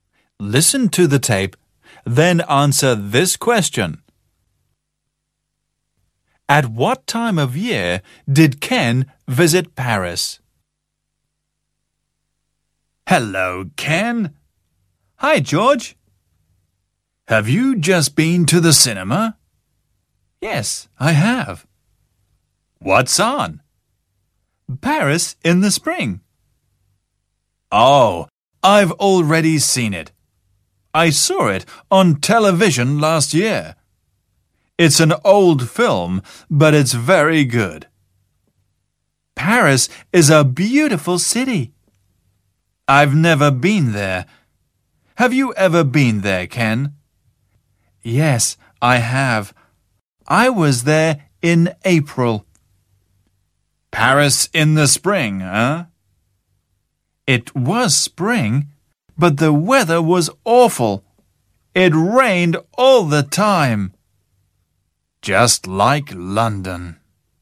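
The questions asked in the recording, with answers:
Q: At what time of year did Ken visit Paris?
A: In the spring (in April)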